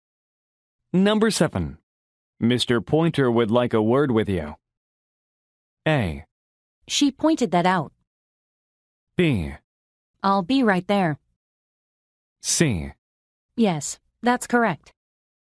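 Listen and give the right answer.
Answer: B: I'll be right there.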